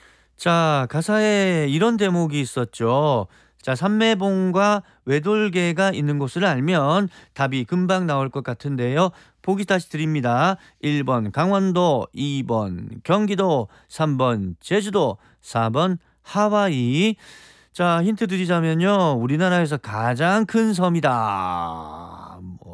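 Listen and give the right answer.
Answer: 3번: 제주도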